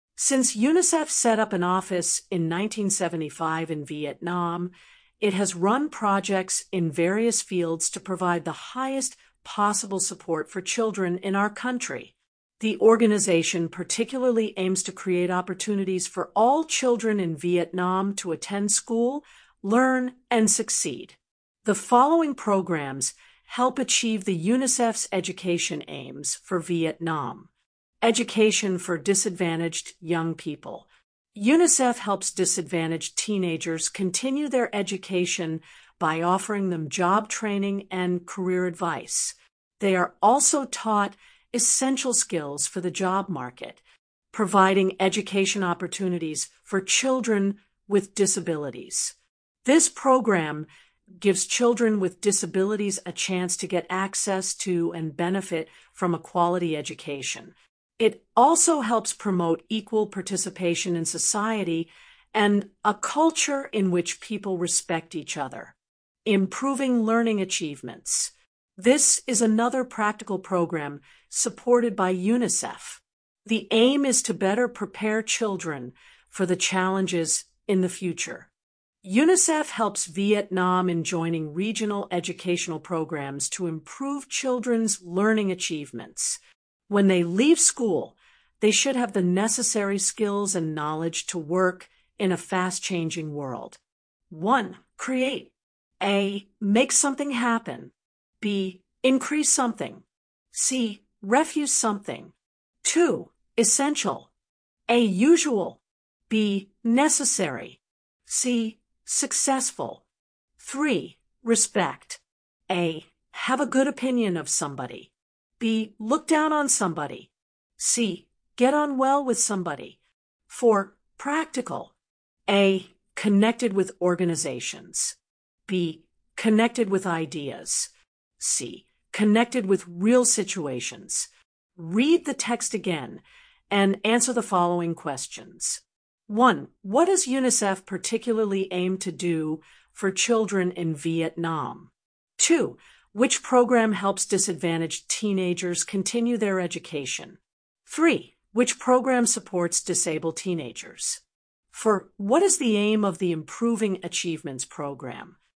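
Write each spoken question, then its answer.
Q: Create.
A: A: Make something happen.

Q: Essential.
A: B: Necessary.

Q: Respect.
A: A: Have a good opinion of somebody.

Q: Practical.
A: C: Connected with real situations.

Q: What does UNICEF particularly aim to do for children in Vietnam?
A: Create opportunities for all children to attend school, learn, and succeed

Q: Which program helps disadvantaged teenagers continue their education?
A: Education for disadvantaged young people

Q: Which program supports disabled teenagers?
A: Providing education opportunities for children with disabilities

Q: What is the aim of the Improving Achievements Program?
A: To better prepare children for the challenges in the future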